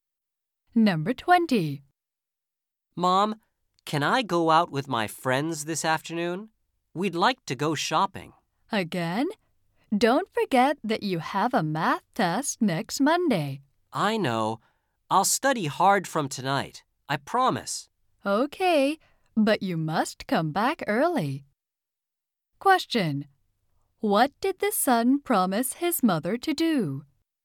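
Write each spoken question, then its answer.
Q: What did the son promise his mother to do?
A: Study hard from tonight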